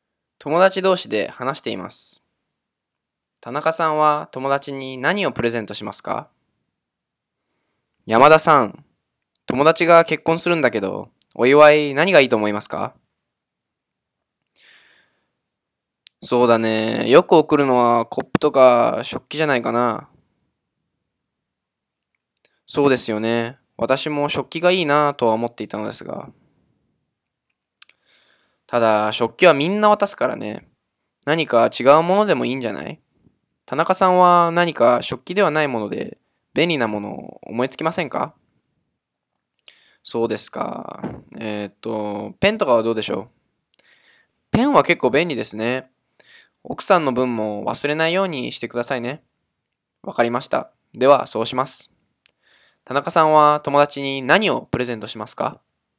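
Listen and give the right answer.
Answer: ペン(夫婦二人分)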